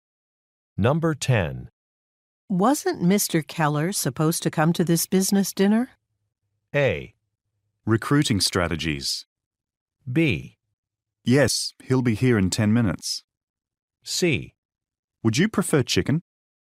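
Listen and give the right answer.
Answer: B: Yes, he'll be here in 10 minutes.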